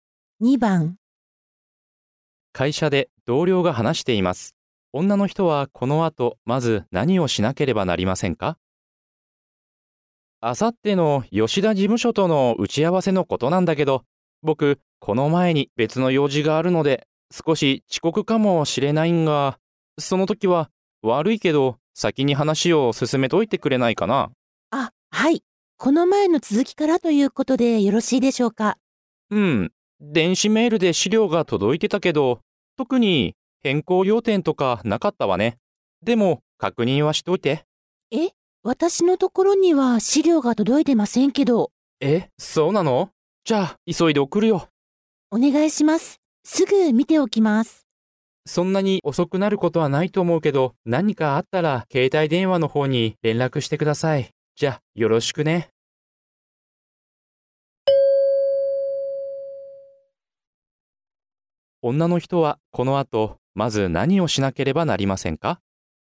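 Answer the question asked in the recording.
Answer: 送られてきた資料を確認する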